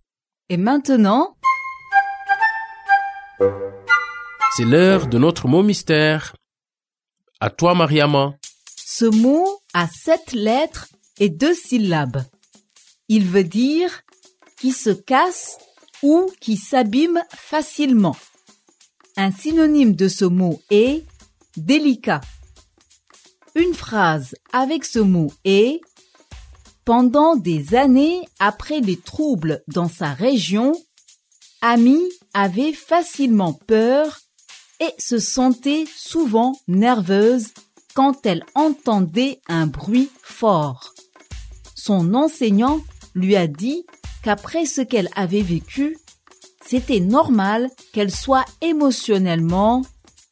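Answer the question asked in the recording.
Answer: fragile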